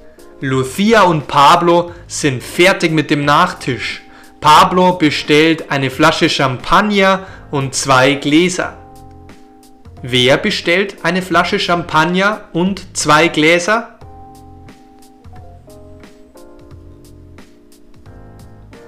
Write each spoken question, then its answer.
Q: Wer bestellt eine Flasche Champagner und zwei Gläser?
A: Pablo.